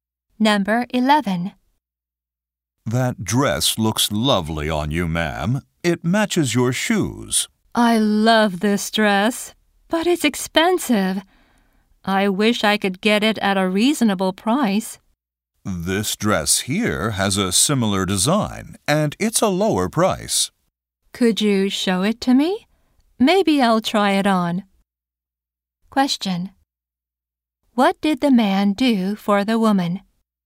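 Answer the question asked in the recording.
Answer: He showed her a similar dress at a lower price.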